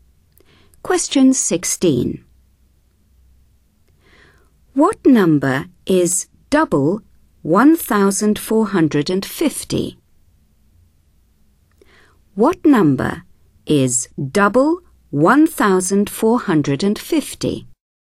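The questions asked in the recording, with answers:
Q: What number is double 1,450?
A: 2,900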